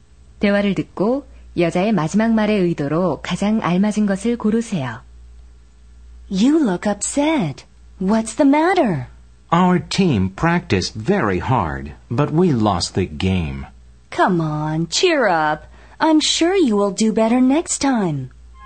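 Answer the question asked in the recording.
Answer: 격려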